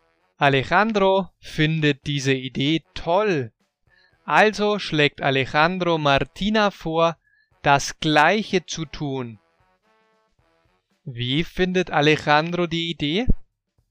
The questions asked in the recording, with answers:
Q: Wie findet Alejandro die Idee?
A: Er findet sie toll.